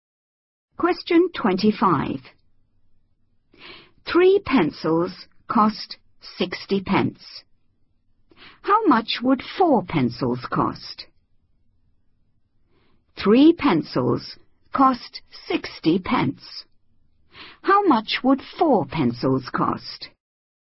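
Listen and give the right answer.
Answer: 80 pence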